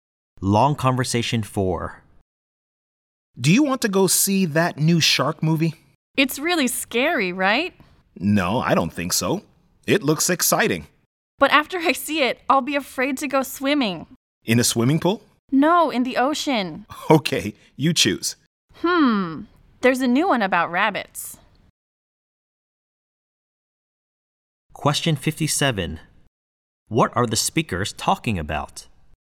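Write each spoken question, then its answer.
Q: What are the speakers talking about?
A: Which movie to go and see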